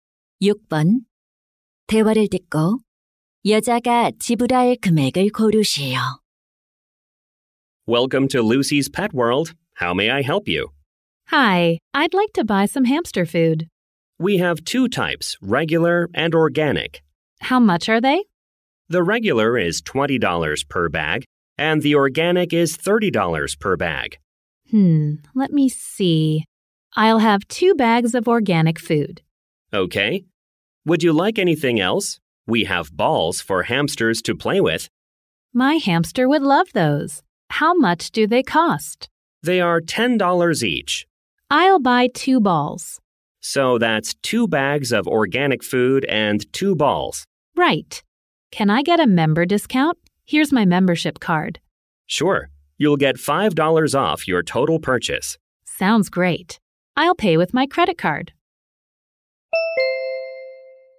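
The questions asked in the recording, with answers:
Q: 대화를 듣고 여자가 지불할 금액을 고르시오.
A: $75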